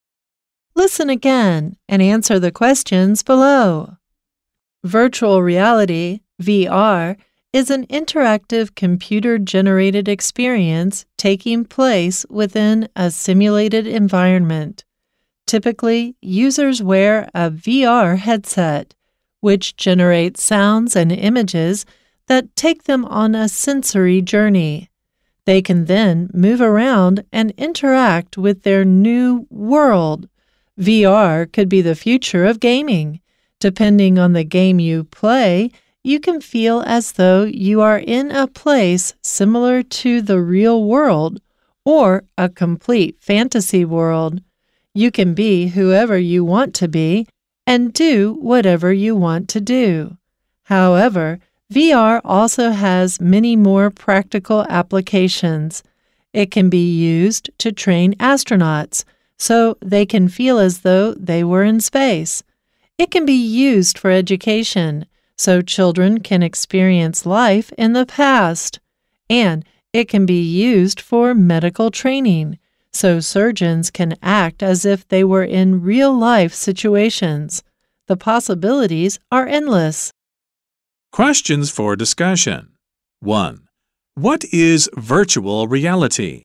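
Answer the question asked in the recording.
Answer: An interactive computer-generated experience taking place within a simulated environment.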